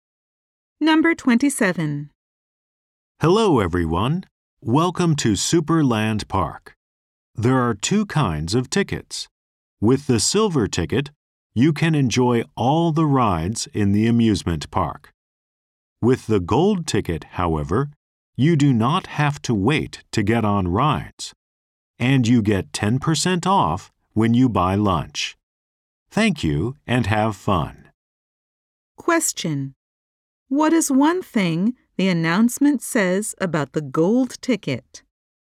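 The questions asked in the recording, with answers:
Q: Question: What is one thing the announcement says about the gold ticket?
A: You don't have to wait to get on rides (and get 10% off lunch).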